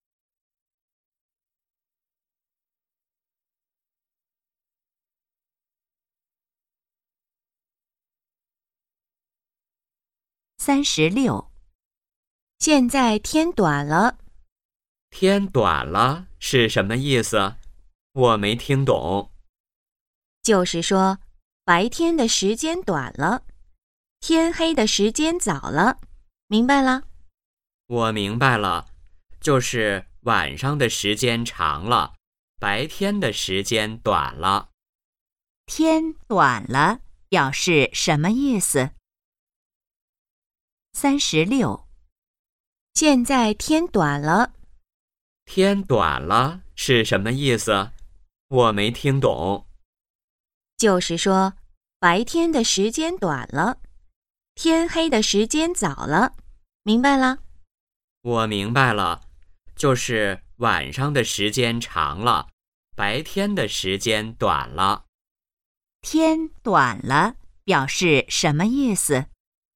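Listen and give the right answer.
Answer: 白天的时间短了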